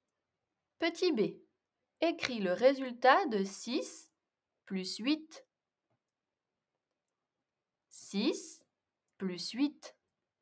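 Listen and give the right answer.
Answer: 14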